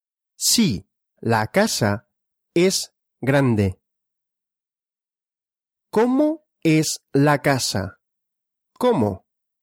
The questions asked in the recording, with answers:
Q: ¿Cómo es la casa? ¿Cómo?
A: Grande. La casa es grande.